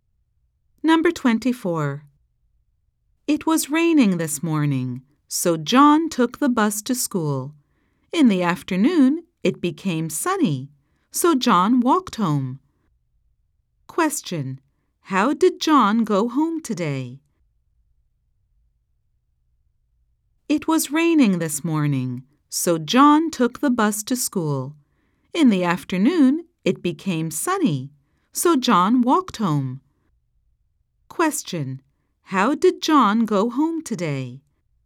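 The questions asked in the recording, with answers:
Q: How did John go home today?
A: He walked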